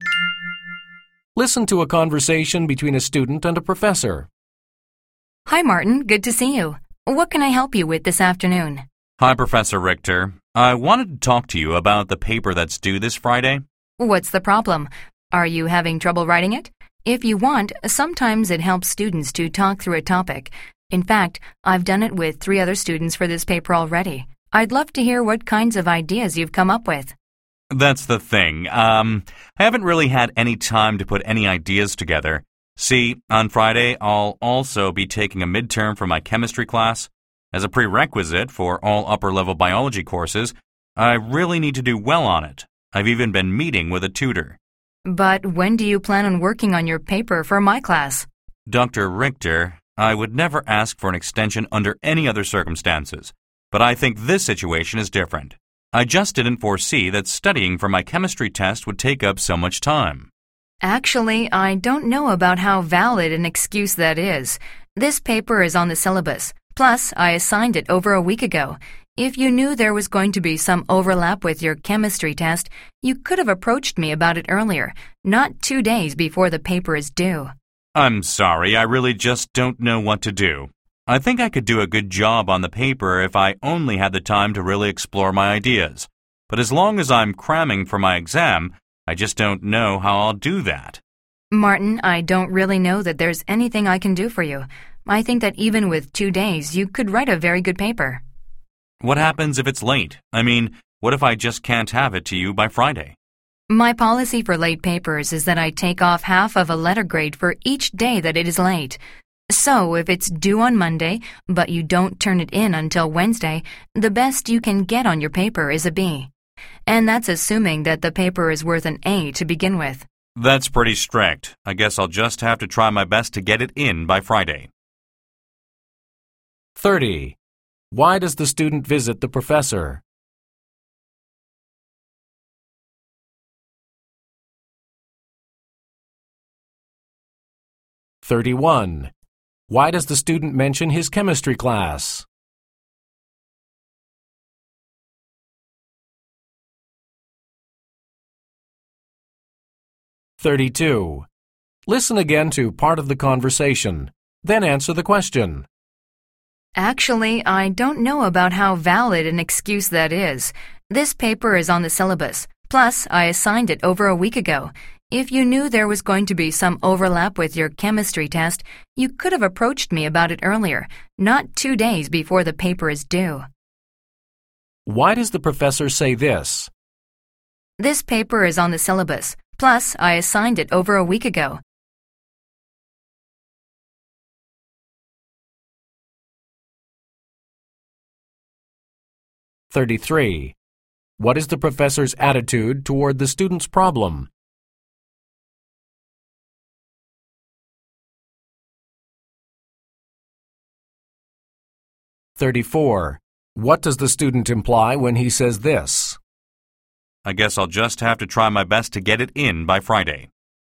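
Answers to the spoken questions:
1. To ask for an extension on his paper
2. To explain why he hasn't had time to work on the paper
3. To point out the student should have known about the paper and asked earlier
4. Unsympathetic; she won't give an extension
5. He will try to finish the paper on time rather than accept a late penalty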